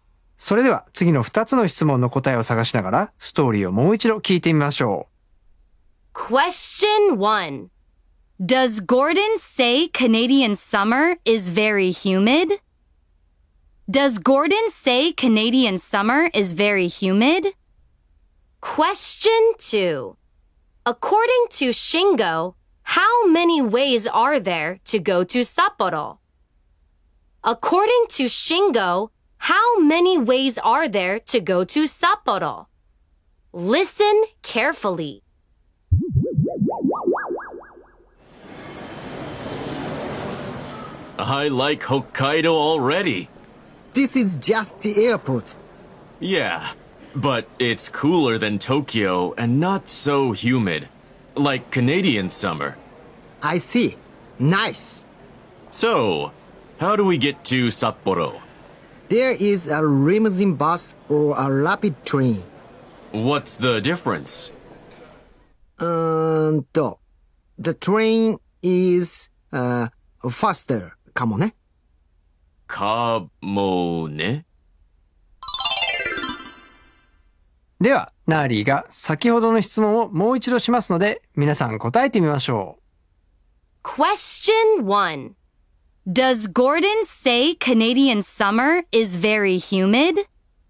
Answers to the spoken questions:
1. No, he doesn't. No, he doesn't.
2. There are two ways. There are two ways.